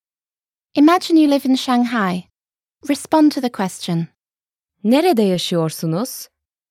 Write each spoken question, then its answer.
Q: Nerede yaşıyorsunuz?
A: Şangay'da yaşıyorum.